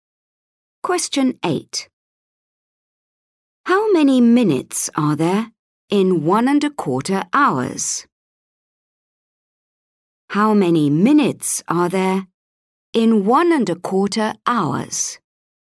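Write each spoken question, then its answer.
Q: How many minutes are there in 1.25 hours?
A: 75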